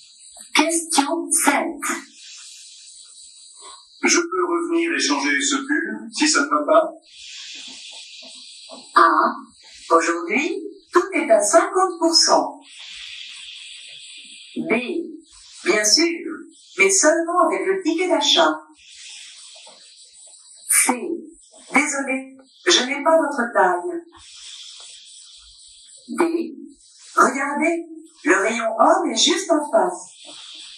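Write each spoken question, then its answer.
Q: Je peux revenir et changer ce pull, si ça ne va pas?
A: B: Bien sûr, mais seulement avec le ticket d'achat.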